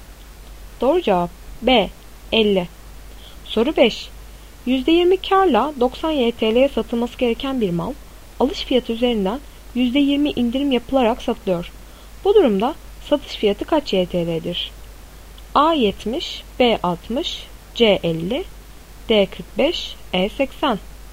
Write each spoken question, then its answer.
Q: Bu durumda satış fiyatı kaç YTL'dir?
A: Doğru cevap B 60.